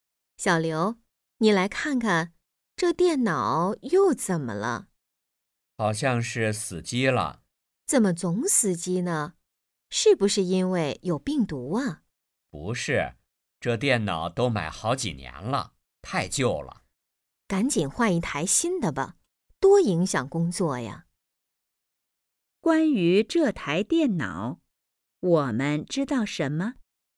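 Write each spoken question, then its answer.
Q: 关于这台电脑,我们知道什么?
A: 电脑太旧了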